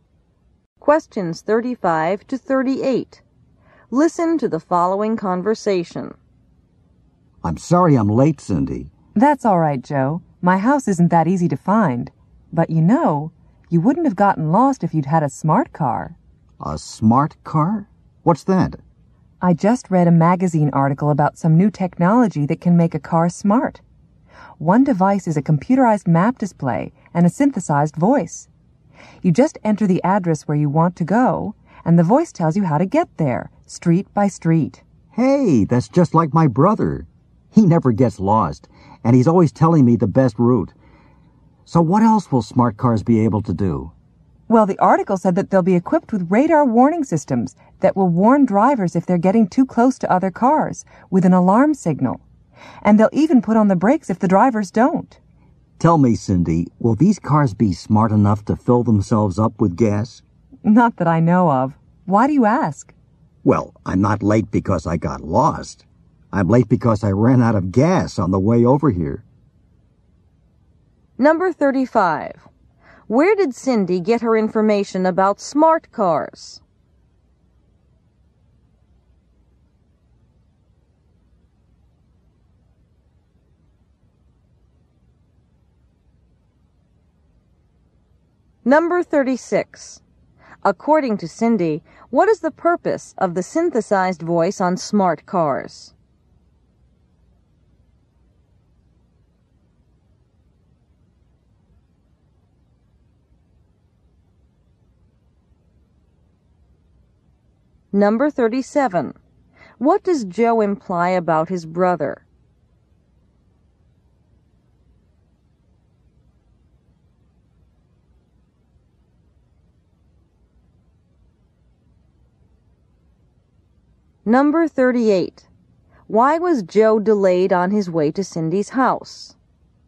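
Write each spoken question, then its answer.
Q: Where did Cindy get her information about smart cars?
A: From a magazine article

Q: According to Cindy, what is the purpose of the synthesized voice on smart cars?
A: To give drivers directions street by street

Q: What does Joe imply about his brother?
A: He has a good sense of direction and never gets lost.

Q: Why was Joe delayed on his way to Cindy's house?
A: He ran out of gas.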